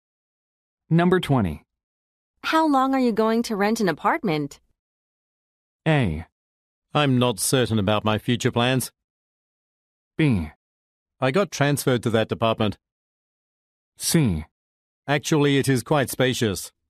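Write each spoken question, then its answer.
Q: How long are you going to rent an apartment?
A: A: I'm not certain about my future plans.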